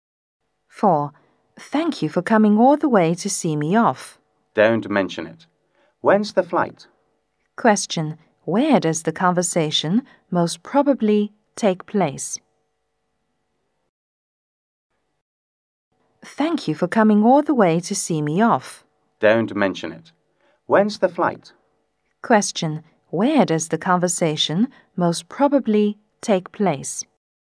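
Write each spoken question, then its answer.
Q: Where does the conversation most probably take place?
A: At the airport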